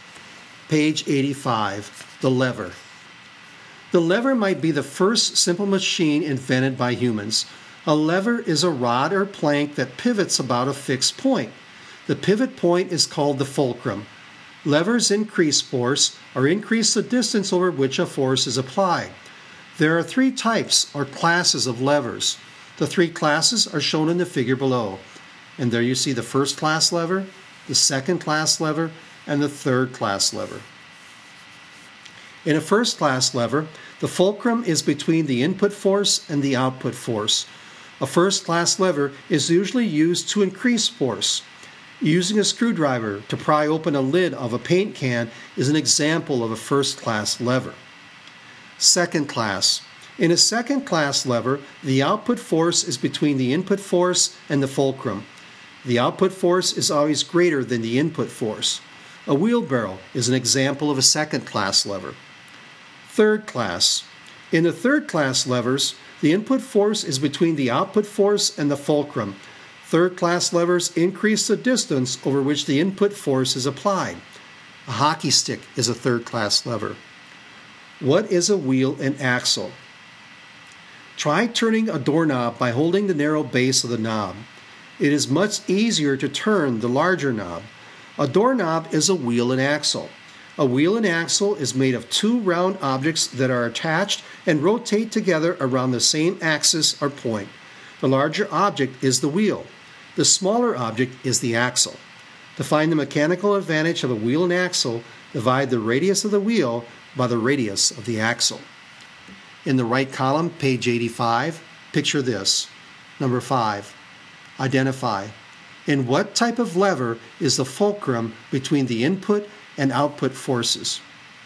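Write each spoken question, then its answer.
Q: In what type of lever is the fulcrum between the input and output forces?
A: A first class lever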